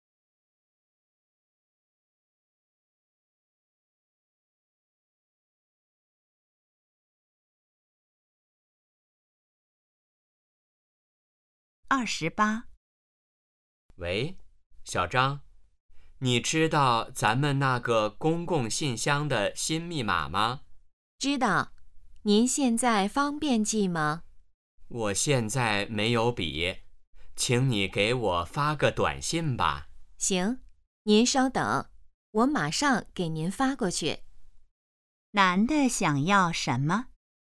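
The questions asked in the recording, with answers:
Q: 男的想要什么?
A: 公共信箱的新密码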